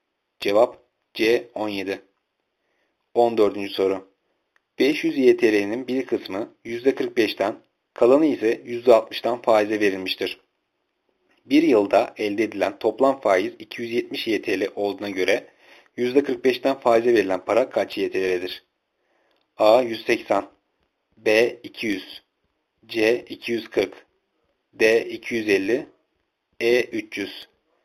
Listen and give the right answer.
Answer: Cevap B 200.